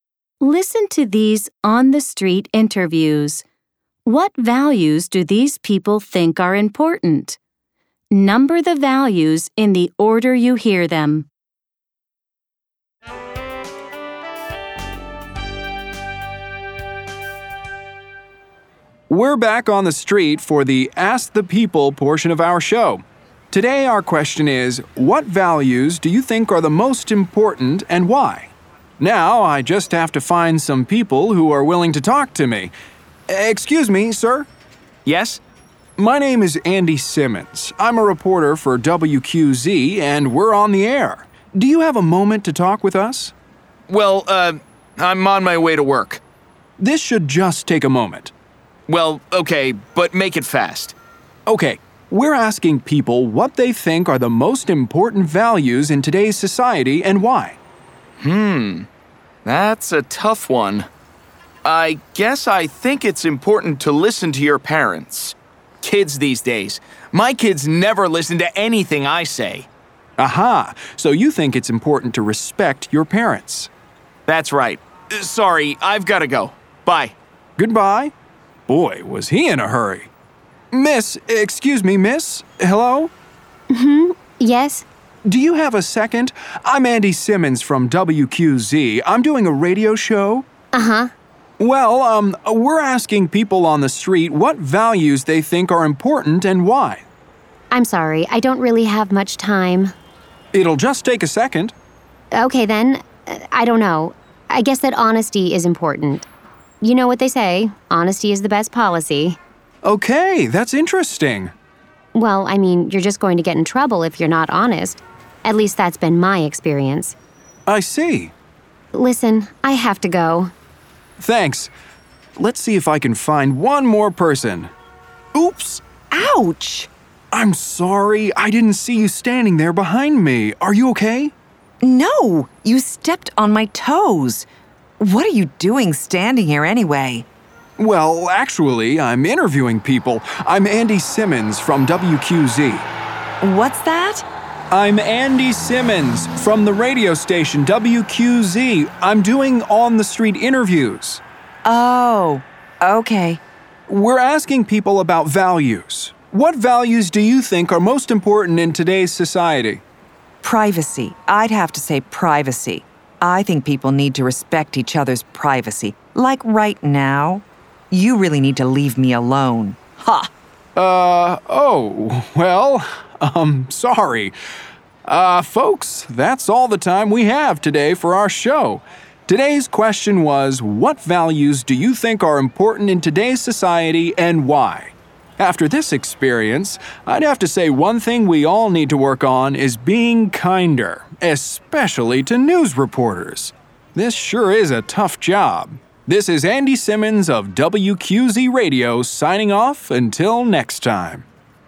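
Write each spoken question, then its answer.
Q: What values do these people think are important?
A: Respecting your parents, honesty, and privacy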